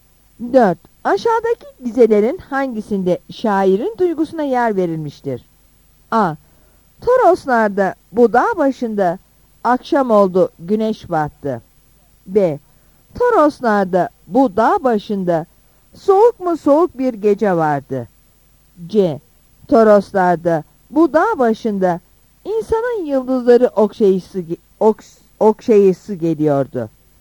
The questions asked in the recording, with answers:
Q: Aşağıdaki dizelerin hangisinde şairin duygusuna yer verilmiştir?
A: Yanıt C'dir.